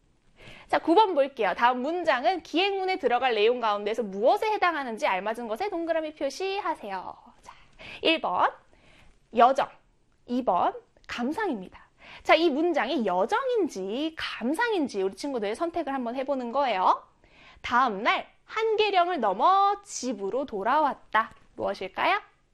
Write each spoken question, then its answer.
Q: 다음 문장은 기행문에 들어갈 내용 가운데에서 무엇에 해당하는지 알맞은 것에 동그라미 표시하세요.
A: 여행하며 다닌 곳, 장소가 나와 있기 때문에 여정에 해당하겠죠.